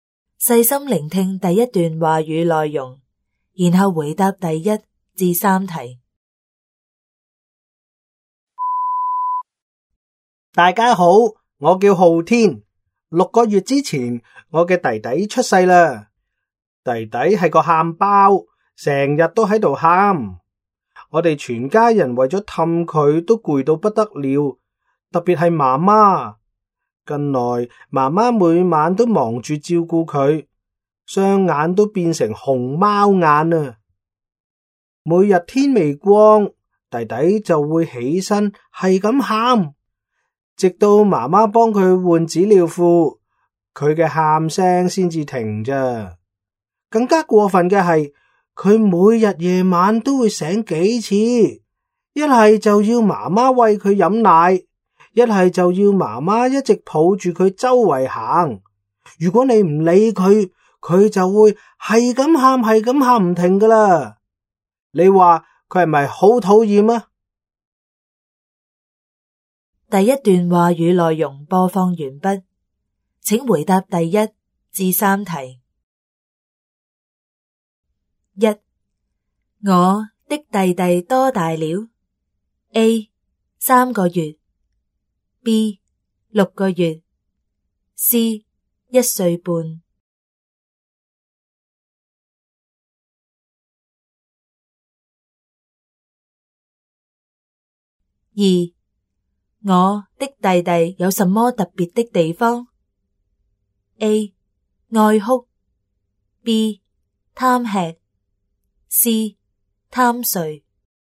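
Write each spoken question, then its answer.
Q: 我的弟弟多大了? A 三个月, B 六个月, C 一岁半。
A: B: 六个月

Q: 我的弟弟有什么特别的地方? A 爱哭, B 贪吃, C 贪睡。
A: A: 爱哭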